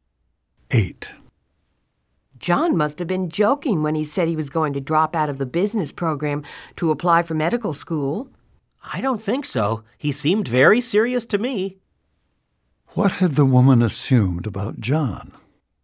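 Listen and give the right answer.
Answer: That John was joking about going to medical school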